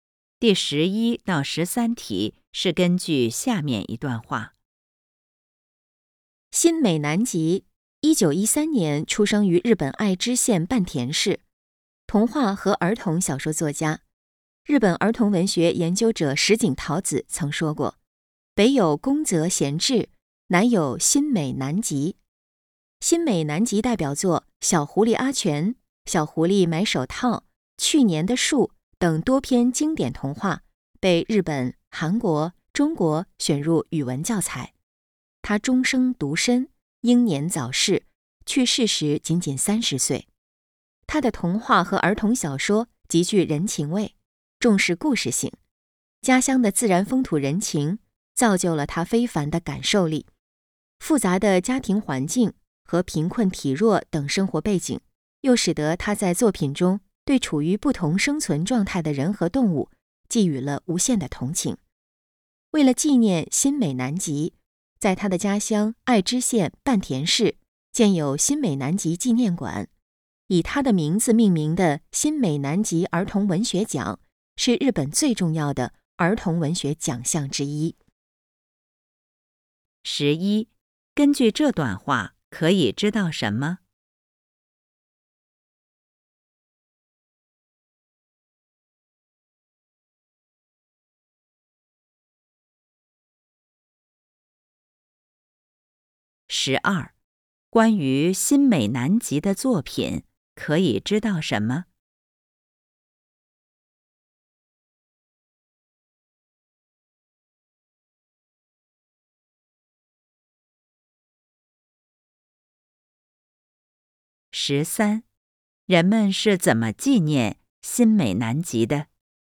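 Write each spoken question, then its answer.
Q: 十三,人们是怎么纪念新美南吉的?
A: 在他家乡建有新美南吉纪念馆,并设立以他名字命名的儿童文学奖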